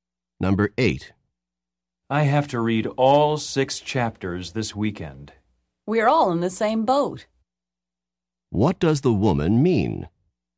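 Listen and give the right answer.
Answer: She has to do the same amount of reading too.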